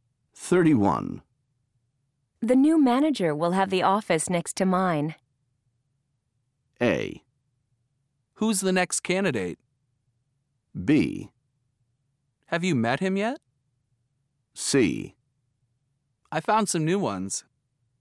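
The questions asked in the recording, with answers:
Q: The new manager will have the office next to mine.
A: B: Have you met him yet?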